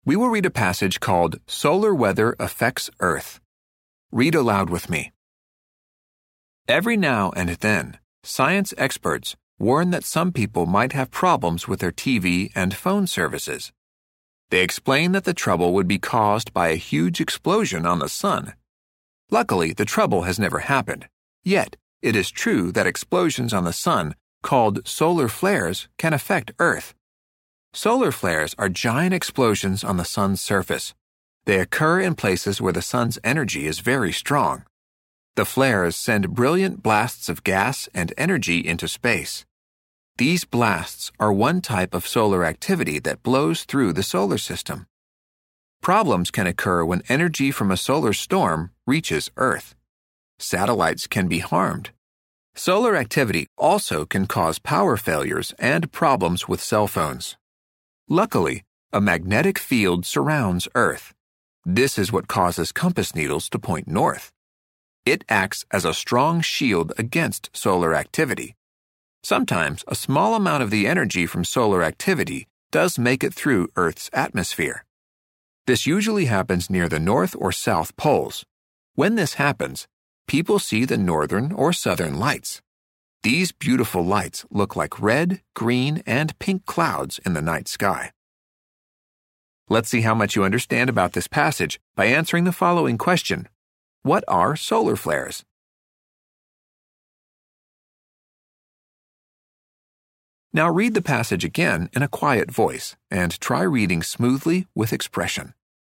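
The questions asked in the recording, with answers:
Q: What are solar flares?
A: Giant explosions on the sun's surface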